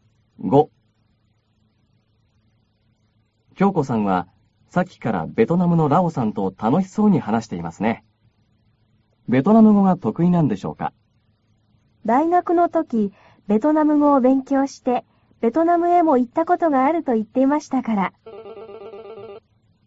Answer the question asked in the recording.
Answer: 大学の時、ベトナム語を勉強してベトナムへも行ったことがあると言っていましたから、ベトナム語が得意なようですよ。